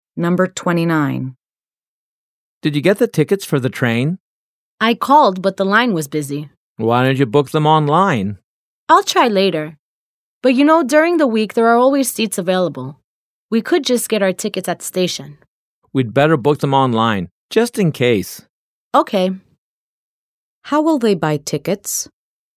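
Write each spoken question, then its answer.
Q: How will they buy tickets?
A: Online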